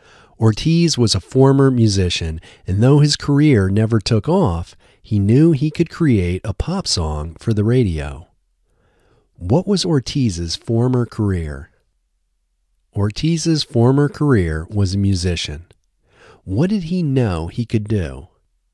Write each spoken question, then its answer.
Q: What did he know he could do?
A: He knew he could create a pop song for the radio.